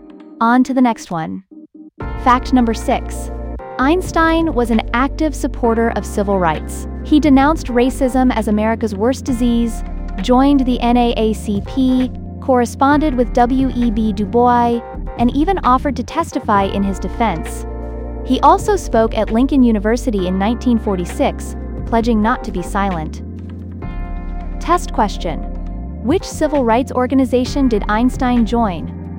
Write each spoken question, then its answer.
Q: Which civil rights organization did Einstein join?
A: Correct answer. The NAACP.